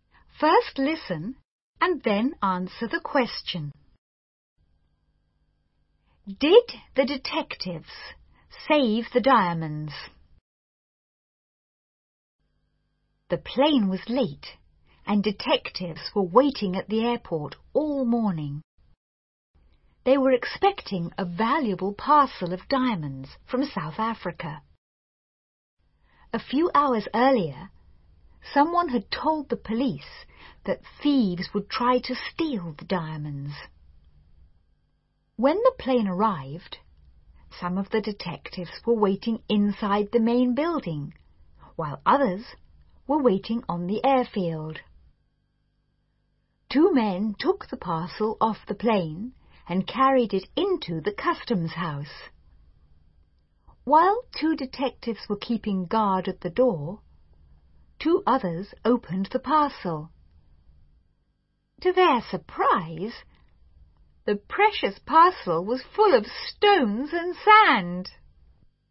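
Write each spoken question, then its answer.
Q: Did the detectives save the diamonds?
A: No, the parcel was full of stones and sand.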